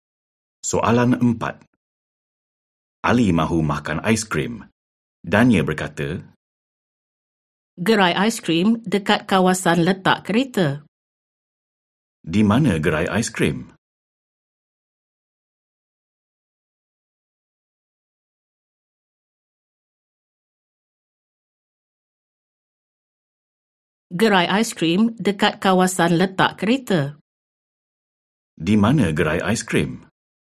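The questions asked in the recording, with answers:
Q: Di mana gerai aiskrim?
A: Dekat kawasan letak kereta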